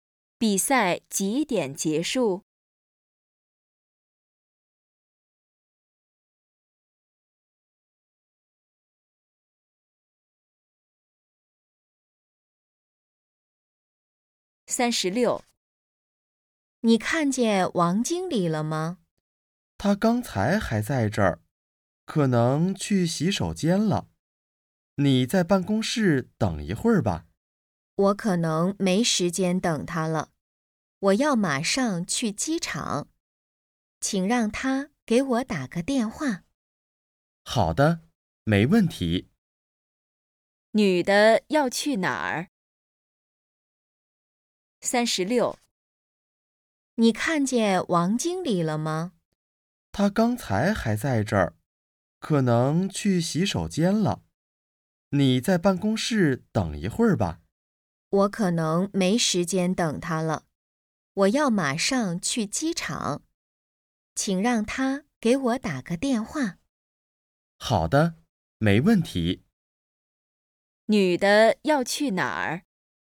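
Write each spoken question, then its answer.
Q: 女的要去哪儿?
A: 机场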